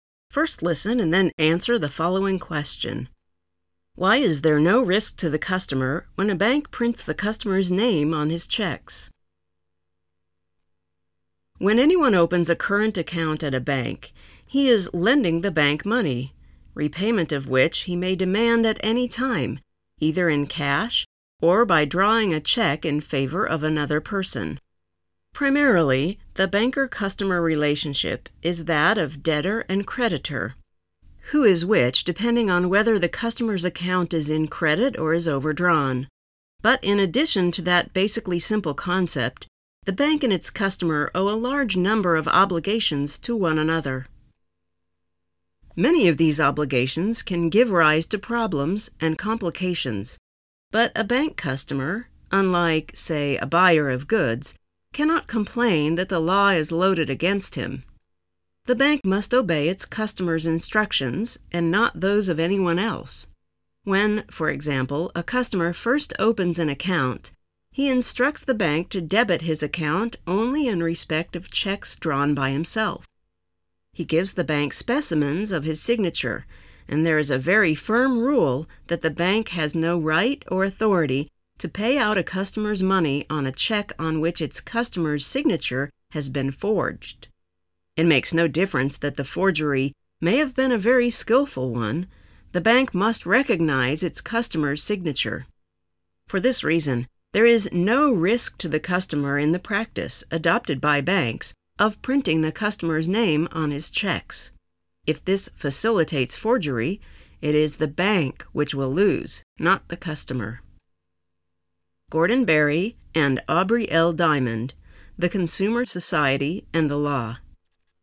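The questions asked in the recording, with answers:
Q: Why is there no risk to the customer when a bank prints the customer's name on his checks?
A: Because the bank must recognize its customer's signature and, if forgery happens, the bank loses, not the customer.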